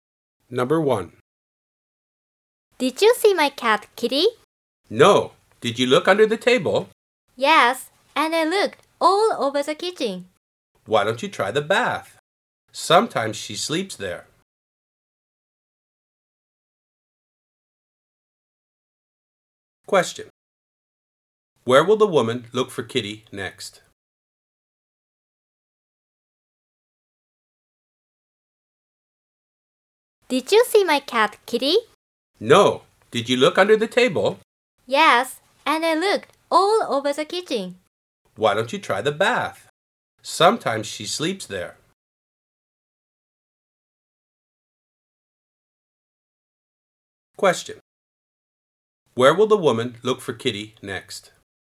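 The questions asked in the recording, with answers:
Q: Where will the woman look for Kitty next?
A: In the bath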